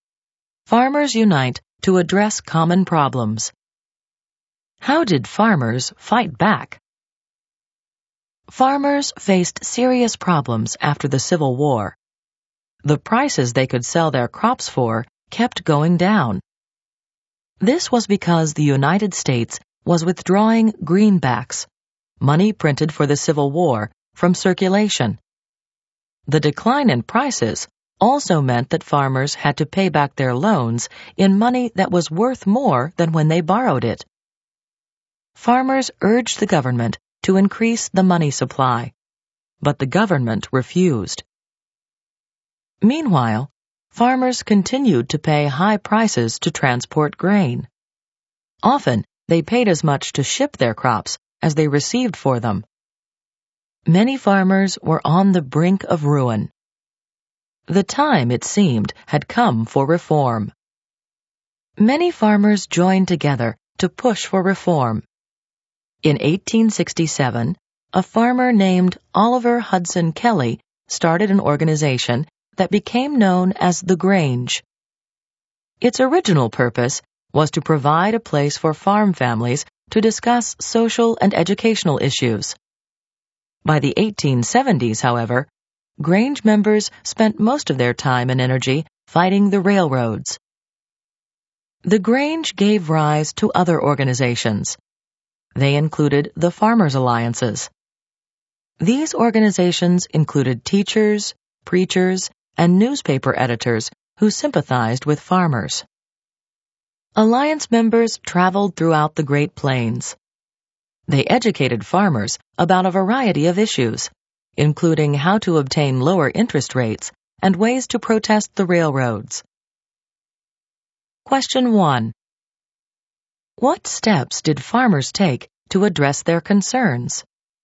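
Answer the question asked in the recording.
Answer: They organized groups like the Grange and Farmers' Alliances to fight the railroads and push for reform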